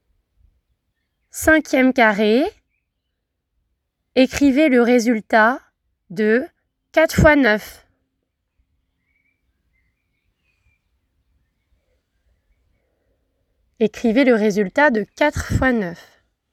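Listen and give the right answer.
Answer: 36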